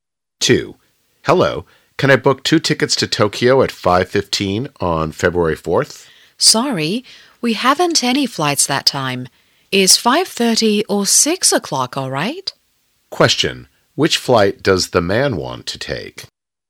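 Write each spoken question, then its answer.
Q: Which flight does the man want to take?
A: The 5:15 flight to Tokyo on February 4th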